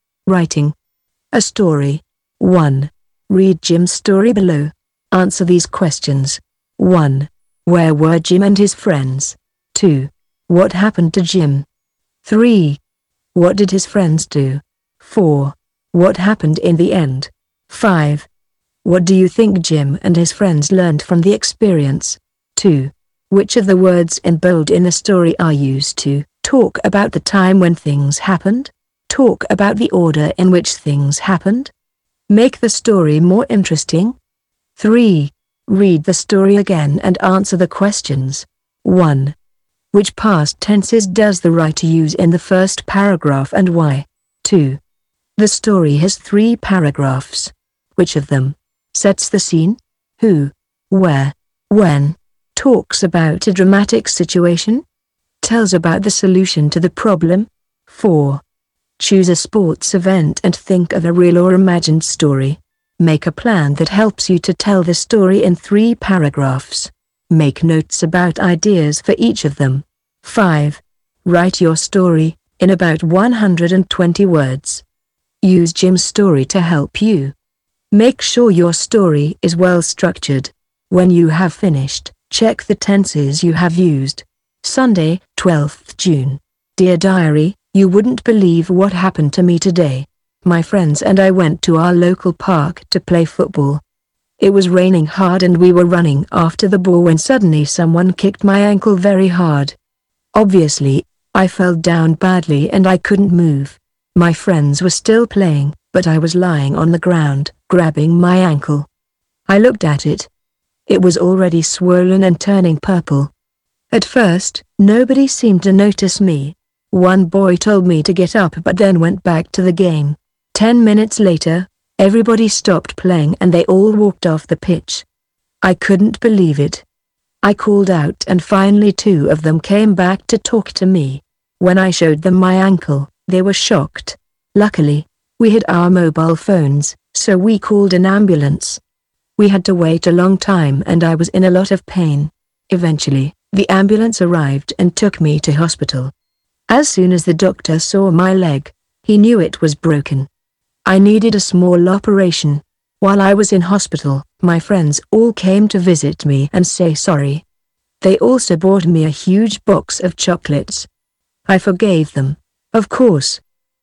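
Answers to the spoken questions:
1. In their local park, playing football
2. Someone kicked his ankle and he broke his leg
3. At first they kept playing and walked off, then two came back and they called an ambulance
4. He had an operation in hospital; his friends visited, said sorry and he forgave them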